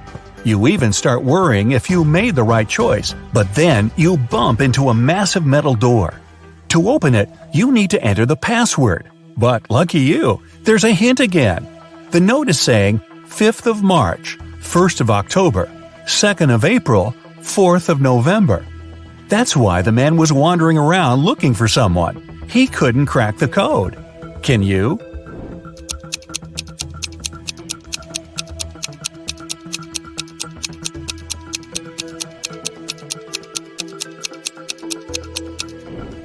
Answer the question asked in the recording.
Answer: The password is HOPE.